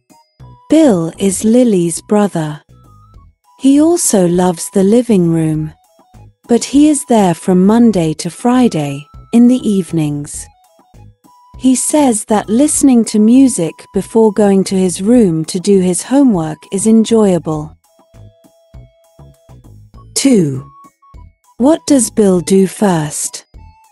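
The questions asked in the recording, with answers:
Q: What does Bill do first?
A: He listens to music (before doing his homework).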